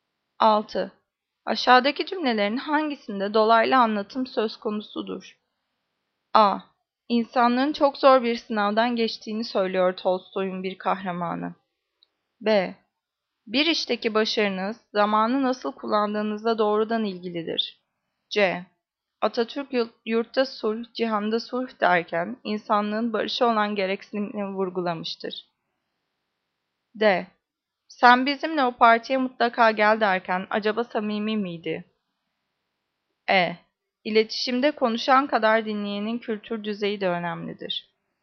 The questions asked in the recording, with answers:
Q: Aşağıdaki cümlelerin hangisinde dolaylı anlatım söz konusudur?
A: Cevap A. İnsanlığın çok zor bir sınavdan geçtiğini söylüyor Tolstoy'un bir kahramanı.